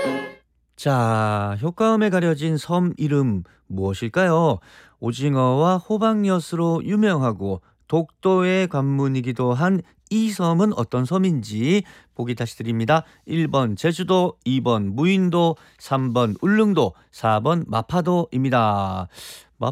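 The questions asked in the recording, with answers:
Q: 자, 효과음에 가려진 섬 이름 무엇일까요?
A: 3번: 울릉도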